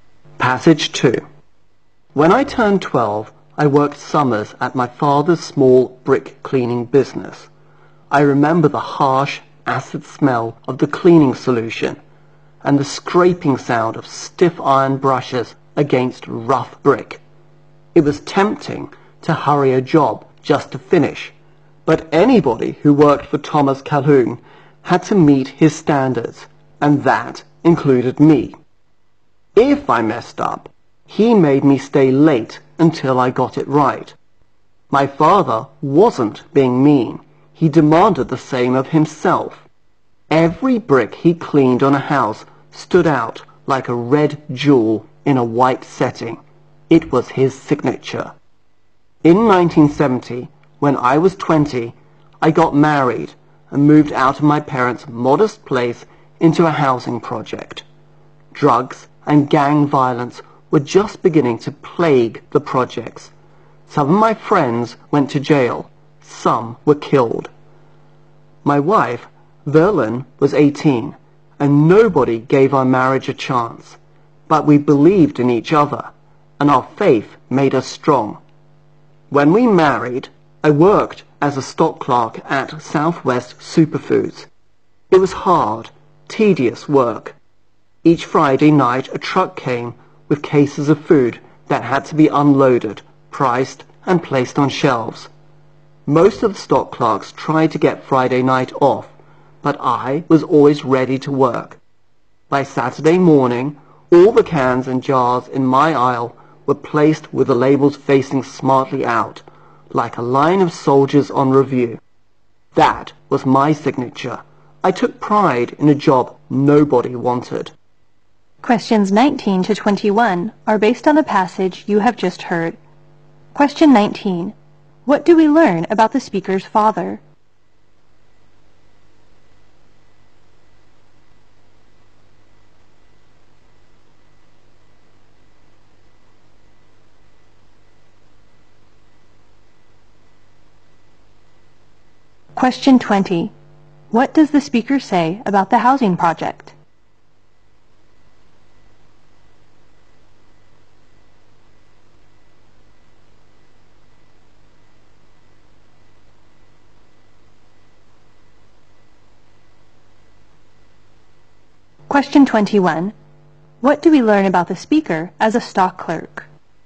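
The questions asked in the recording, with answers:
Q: What do we learn about the speaker's father?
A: He demanded high standards of himself and others

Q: What does the speaker say about the housing project?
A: Drugs and gang violence were beginning to plague it

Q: What do we learn about the speaker as a stock clerk?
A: He took pride in a job nobody wanted and was always ready to work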